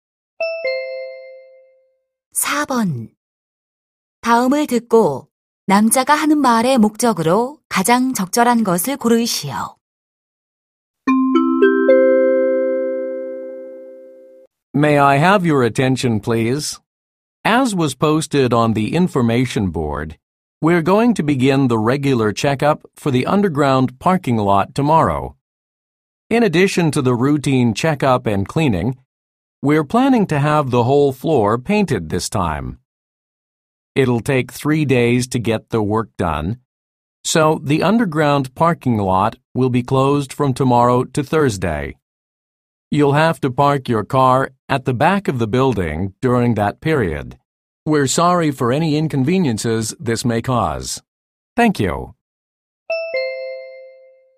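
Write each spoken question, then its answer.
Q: 다음을 듣고 남자가 하는 말의 목적으로 가장 적절한 것을 고르시오.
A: 지하 주차장 점검으로 인한 폐쇄를 알리려고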